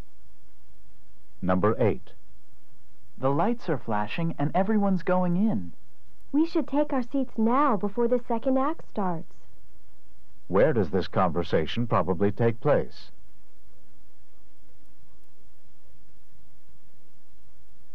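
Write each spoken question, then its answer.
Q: Where does this conversation probably take place?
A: In a theater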